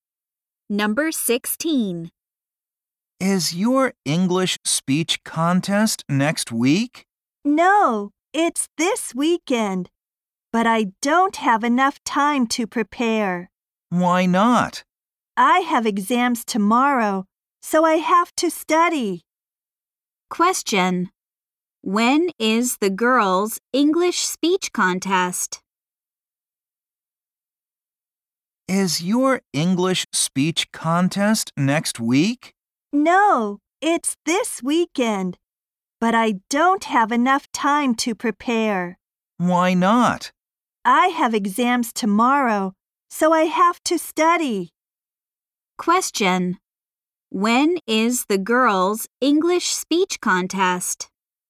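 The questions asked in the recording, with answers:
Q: When is the girls' English speech contest?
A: This weekend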